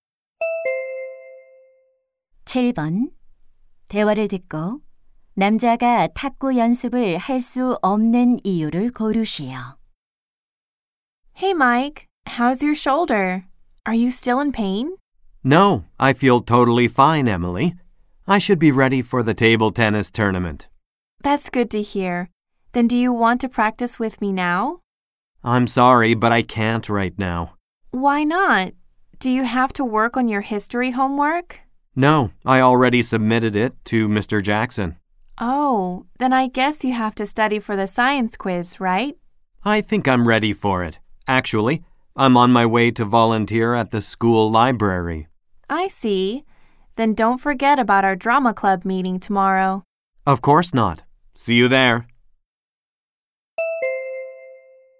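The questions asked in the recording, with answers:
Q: 대화를 듣고 남자가 탁구 연습을 할 수 없는 이유를 고르시오.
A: 학교 도서관에서 봉사활동을 해야 해서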